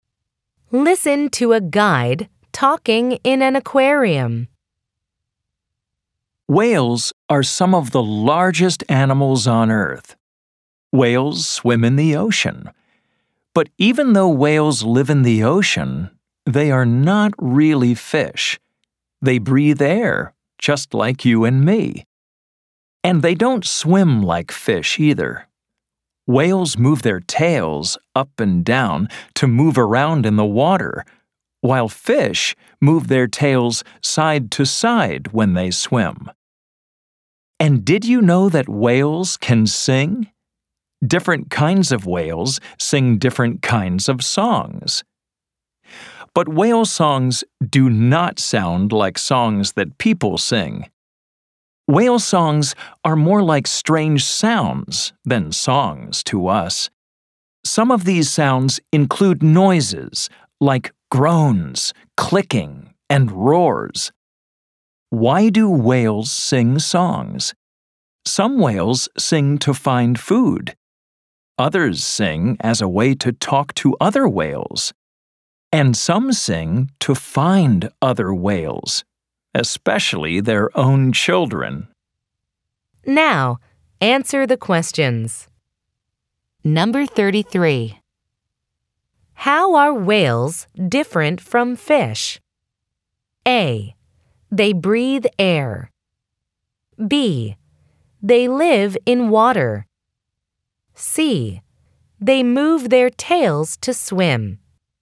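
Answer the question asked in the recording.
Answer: A: They breathe air.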